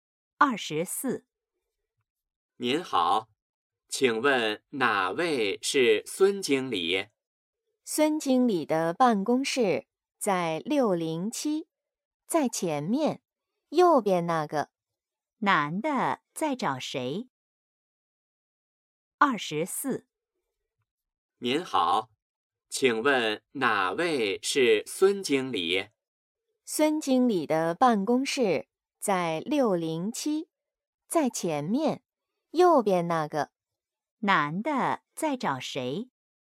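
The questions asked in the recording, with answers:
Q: 男的在找谁?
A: 孙经理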